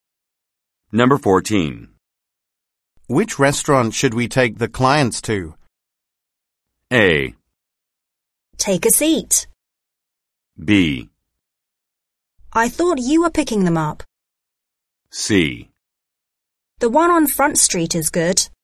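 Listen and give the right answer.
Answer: C: The one on Front Street is good.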